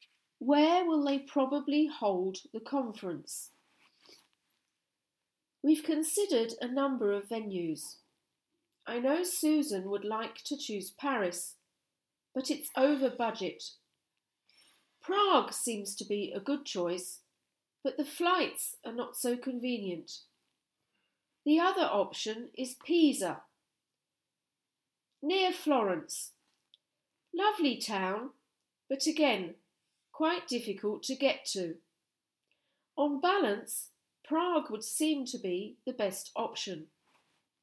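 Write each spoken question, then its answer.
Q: Where will they probably hold the conference?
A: Prague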